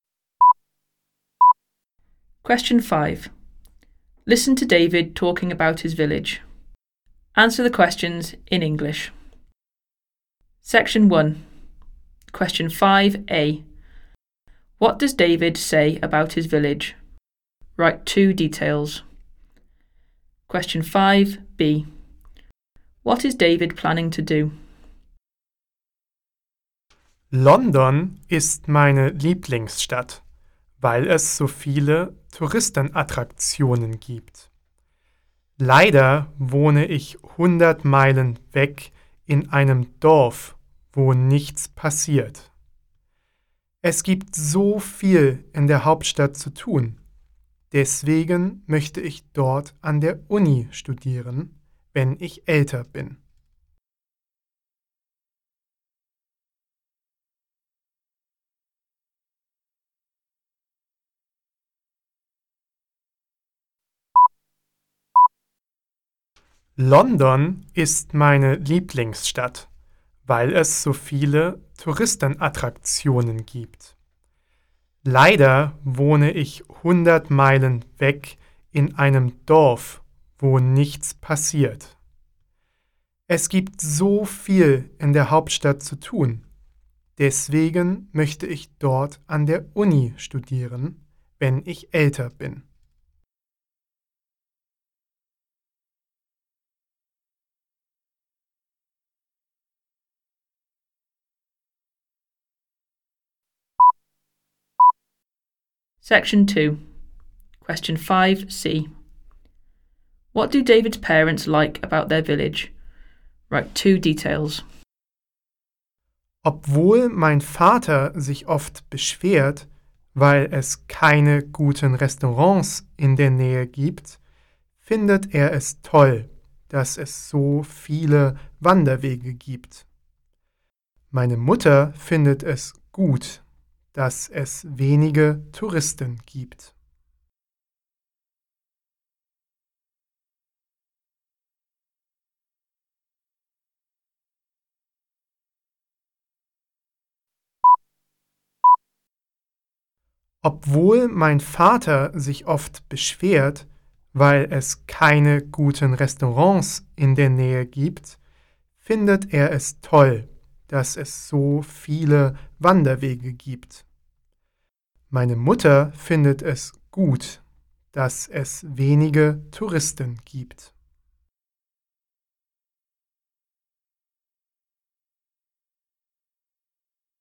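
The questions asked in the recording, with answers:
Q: What does David say about his village?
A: It is 100 miles from London and nothing happens there

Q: What is David planning to do?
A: Study at university in London when he is older

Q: What do David's parents like about their village?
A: Lots of hiking trails (father) and few tourists (mother)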